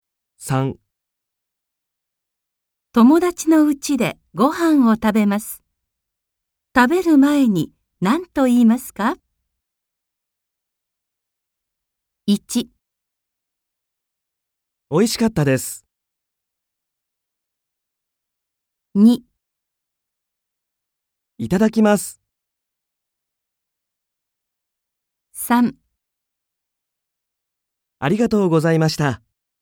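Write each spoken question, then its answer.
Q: 友達の家でご飯を食べます。食べる前に何と言いますか?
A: 2: いただきます。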